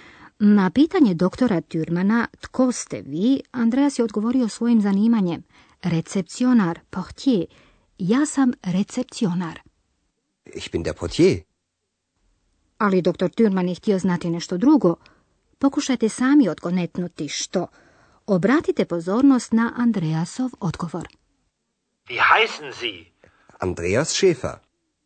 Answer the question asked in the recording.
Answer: Doktor Türman je pitao Andreasa za ime.